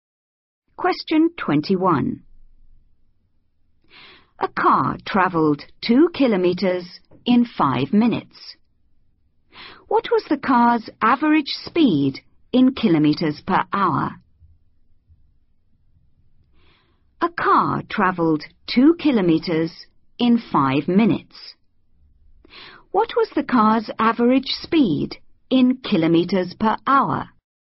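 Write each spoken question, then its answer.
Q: What was the car's average speed in kilometres per hour?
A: 24 km/h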